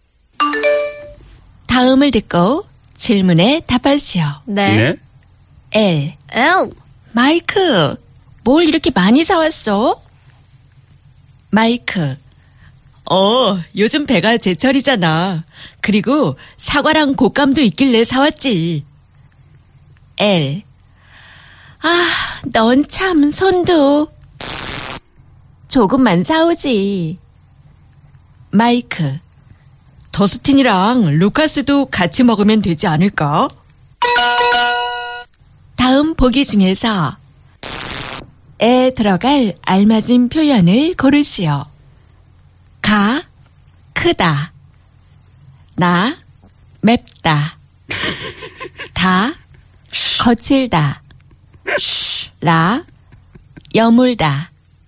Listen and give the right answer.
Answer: 가, 손이 크다.